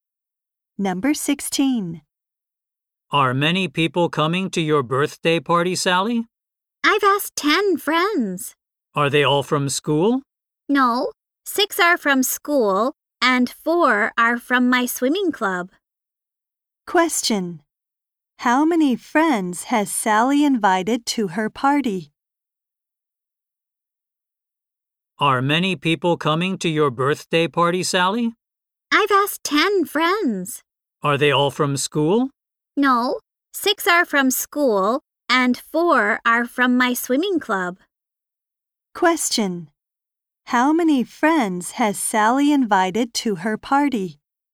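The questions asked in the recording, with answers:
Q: How many friends has Sally invited to her party?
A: 10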